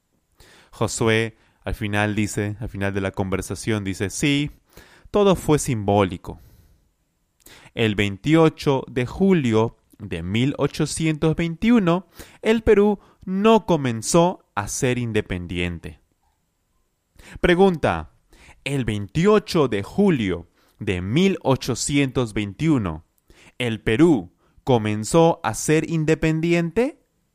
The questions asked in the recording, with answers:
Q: el 28 de julio de 1821, ¿el Perú comenzó a ser independiente?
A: No, claro que no.